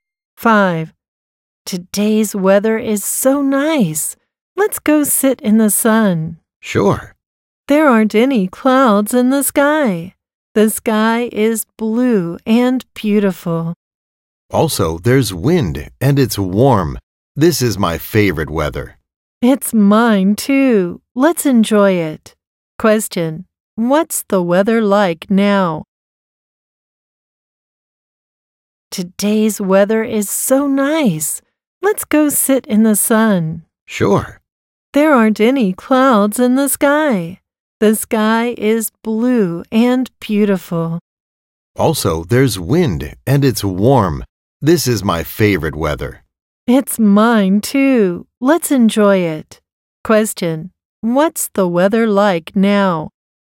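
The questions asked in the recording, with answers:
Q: what's the weather like now?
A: Sunny, windy and warm.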